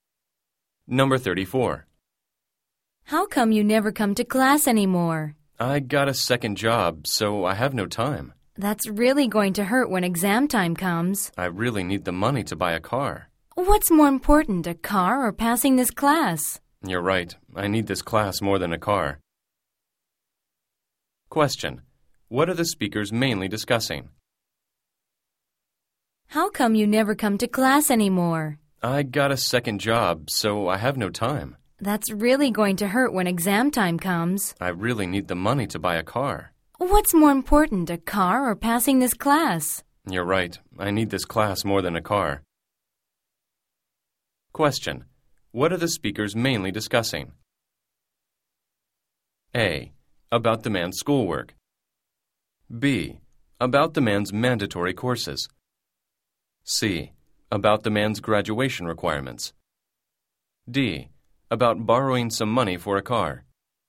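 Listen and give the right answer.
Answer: A: About the man's schoolwork.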